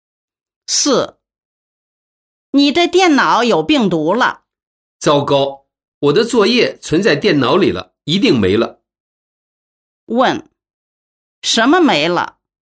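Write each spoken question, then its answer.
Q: 什么没了?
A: 存在电脑里的作业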